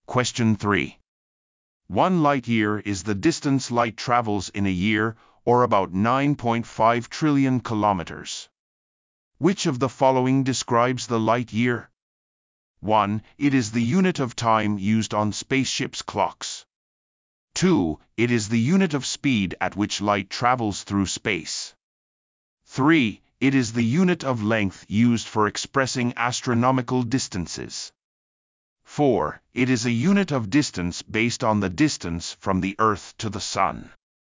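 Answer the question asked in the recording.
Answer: 3: It is the unit of length used for expressing astronomical distances.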